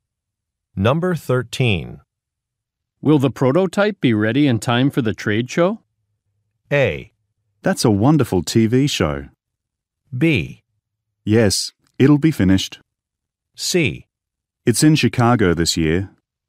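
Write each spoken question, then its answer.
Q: Will the prototype be ready in time for the trade show?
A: B: Yes, it'll be finished.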